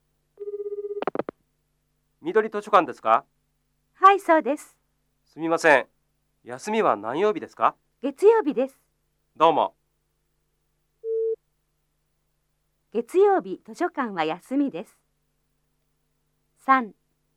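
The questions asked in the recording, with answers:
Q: 月曜日、図書館は休みです。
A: ○(はい)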